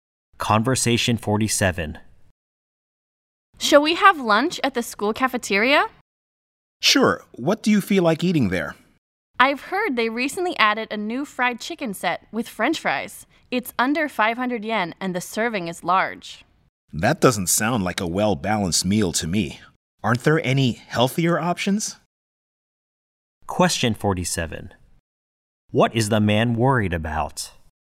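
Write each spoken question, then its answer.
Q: What is the man worried about?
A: The meal is not healthy or well-balanced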